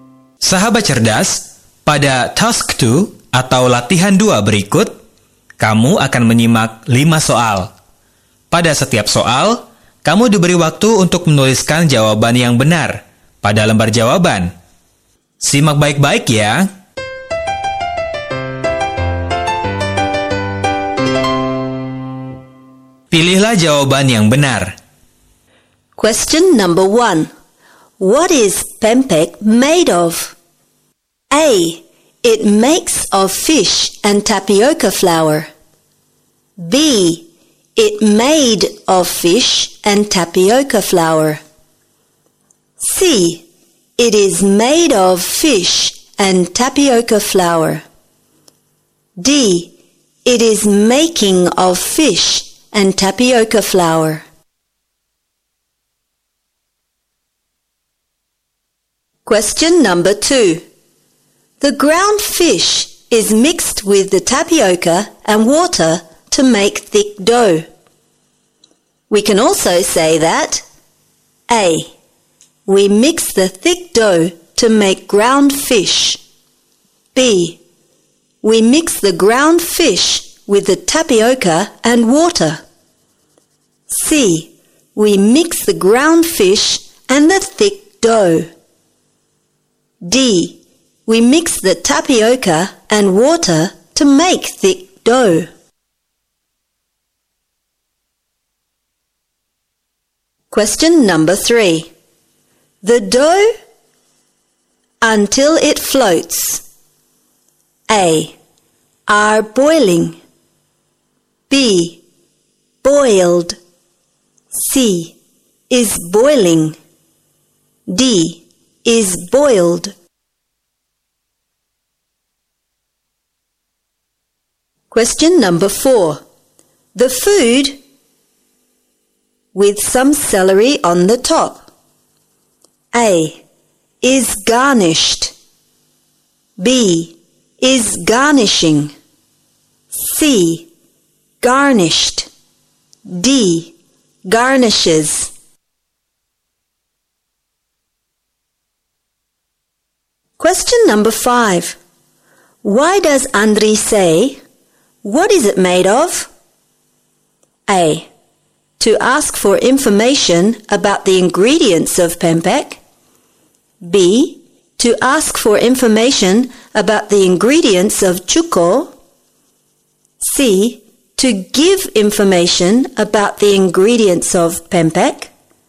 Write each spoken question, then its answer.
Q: What is pempek made of?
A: C. It is made of fish and tapioca flour.

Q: The ground fish is mixed with the tapioca and water to make thick dough. We can also say that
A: B. We mix the ground fish with the tapioca and water.

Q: The dough until it floats.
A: D. Is boiled.

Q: The food with some celery on the top.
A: A. Is garnished.

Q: Why does Andri say, "What is it made of?"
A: A. To ask for information about the ingredients of pempek.